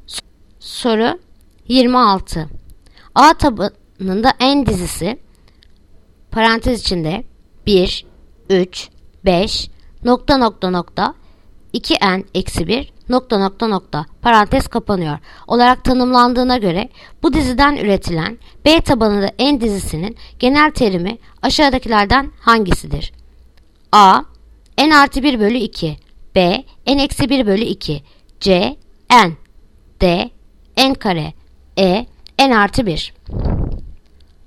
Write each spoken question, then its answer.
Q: A tabanında en dizisi parantez içinde 1, 3, 5 nokta nokta nokta 2N eksi 1 nokta nokta nokta parantez kapanıyor olarak tanımlandığına göre bu diziden üretilen B tabanında en dizisinin genel terimi aşağıdakilerden hangisidir?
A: Yanıt Ceyhan n.